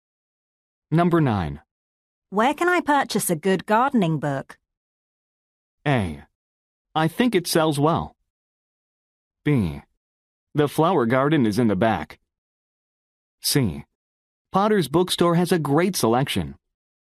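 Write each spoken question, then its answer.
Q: Where can I purchase a good gardening book?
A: C: Potter's Bookstore has a great selection.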